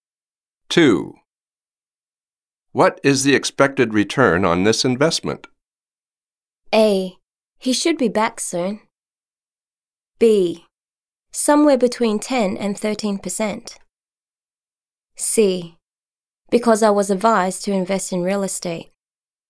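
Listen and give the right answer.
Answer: B: Somewhere between 10% and 13%.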